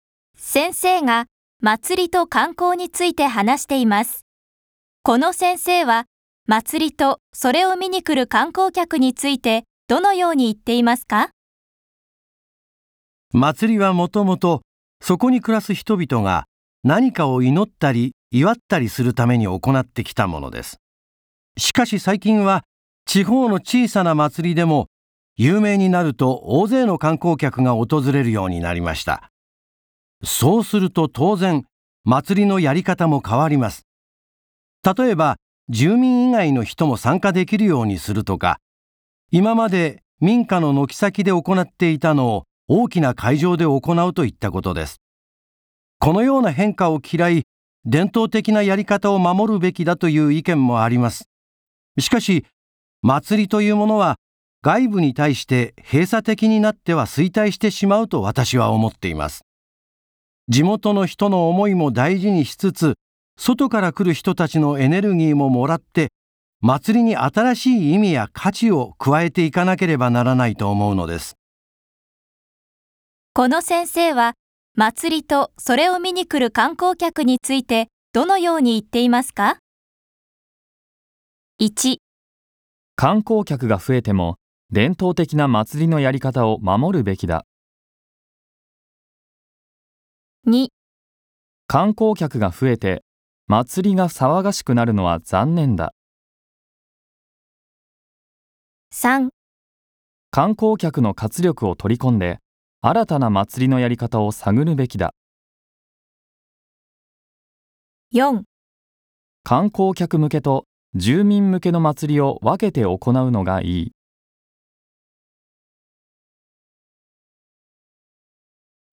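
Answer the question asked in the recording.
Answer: 3: 観光客の活力を取り込んで新たな祭りのやり方を探るべきだ。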